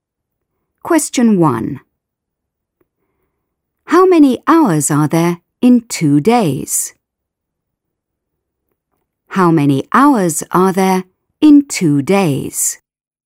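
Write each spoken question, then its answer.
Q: How many hours are there in 2 days?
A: 48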